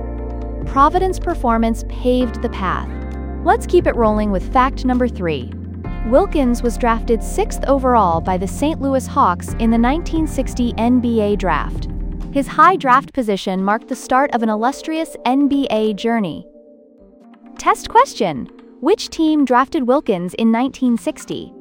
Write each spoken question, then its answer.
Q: which team drafted Wilkins in 1960?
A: St. Louis Hawks.